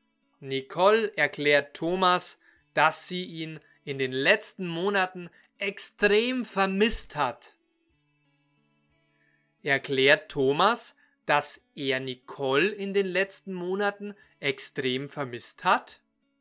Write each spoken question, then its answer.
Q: Erklärt Thomas, dass er Nicole in den letzten Monaten extrem vermisst hat?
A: Nein, umgekehrt. Nicole erklärt Thomas, dass sie ihn in den letzten Monaten extrem vermisst hat.